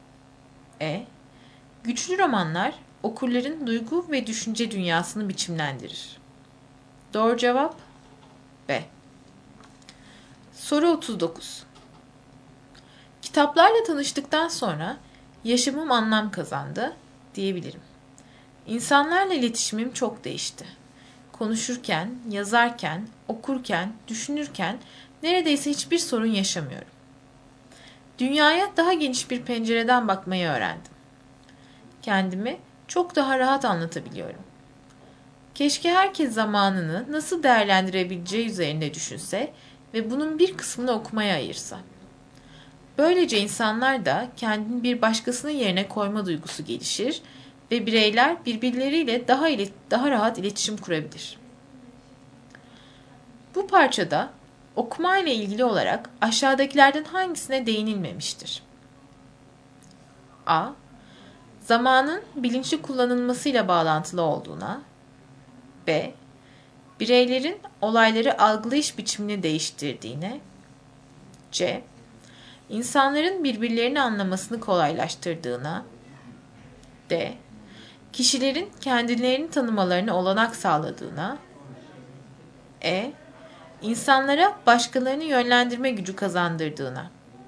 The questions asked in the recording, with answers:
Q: Bu parçada okumayla ilgili olarak aşağıdakilerden hangisine değinilmemiştir?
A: Doğru cevap E.